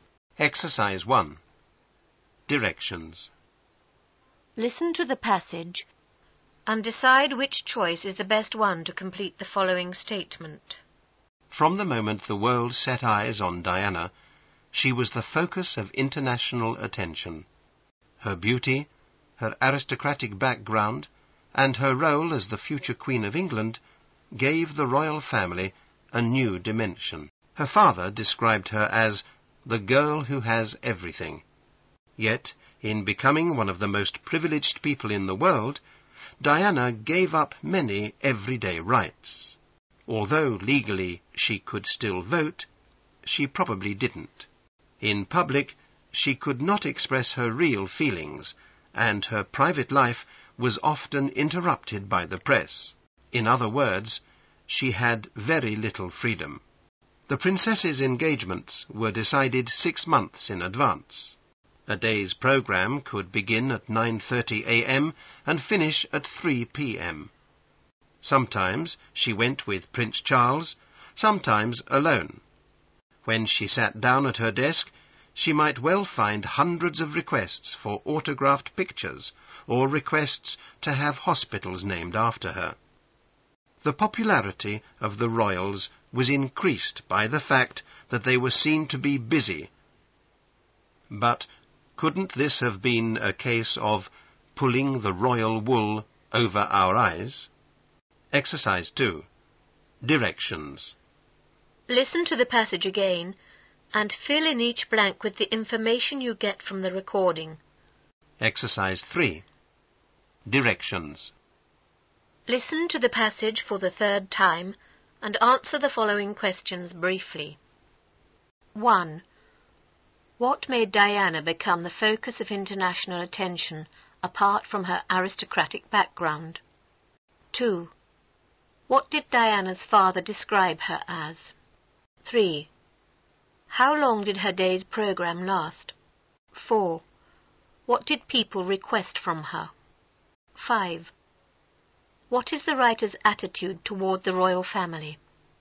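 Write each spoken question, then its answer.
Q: What made Diana become the focus of international attention apart from her aristocratic background?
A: Her beauty and her role as future Queen of England

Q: What did Diana's father describe her as?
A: The girl who has everything

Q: How long did her day's program last?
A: From 9:30 a.m. to 3 p.m.

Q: What did people request from her?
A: Autographed pictures and hospitals named after her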